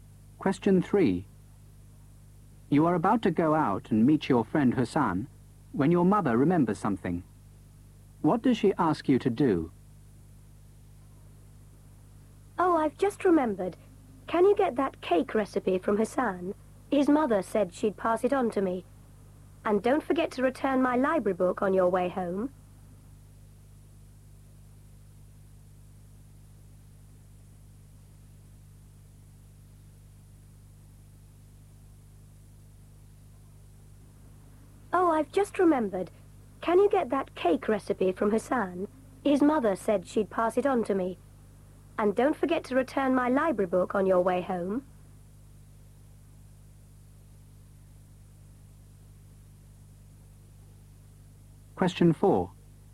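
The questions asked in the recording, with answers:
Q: What does she ask you to do?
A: Get the cake recipe from Hassan and return her library book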